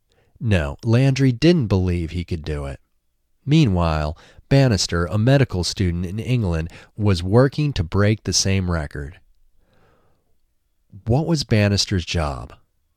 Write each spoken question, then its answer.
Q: What was Bannister's job?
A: Bannister was a medical student.